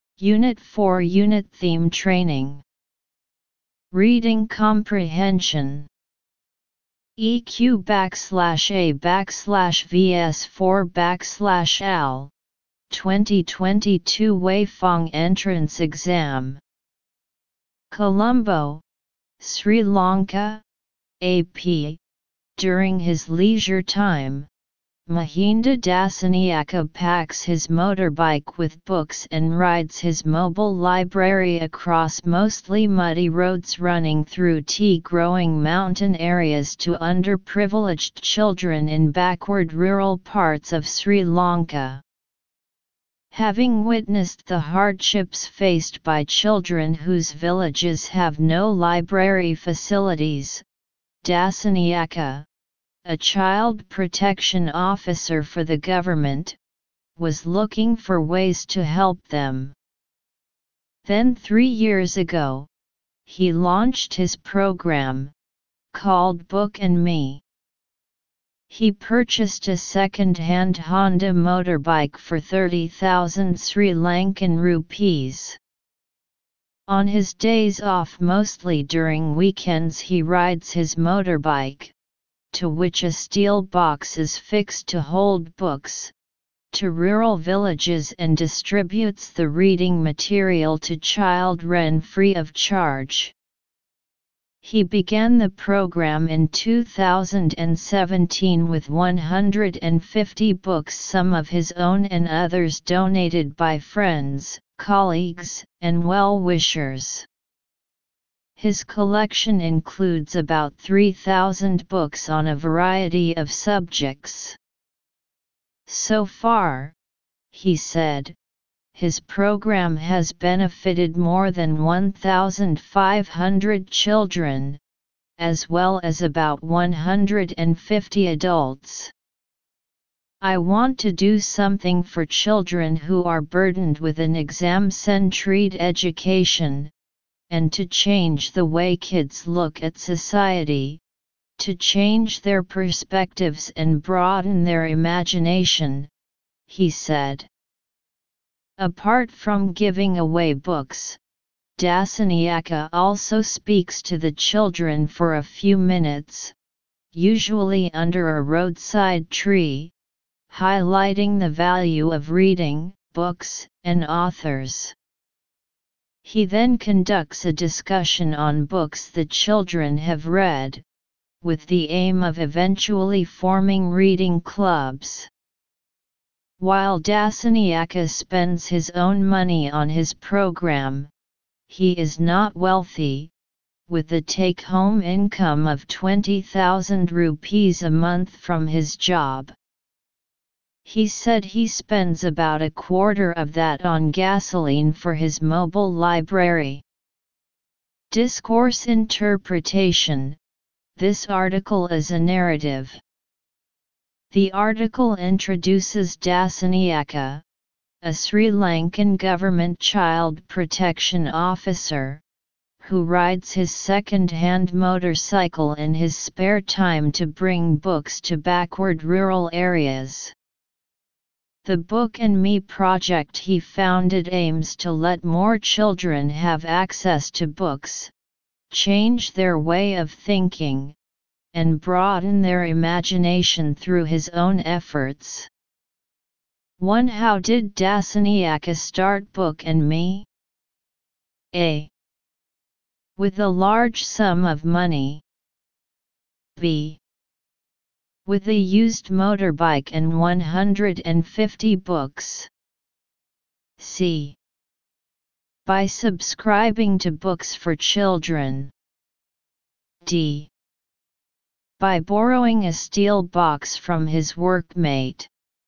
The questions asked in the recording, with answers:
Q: How did Dasaniaka start Book and Me?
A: Analysis: choose B to understand the details.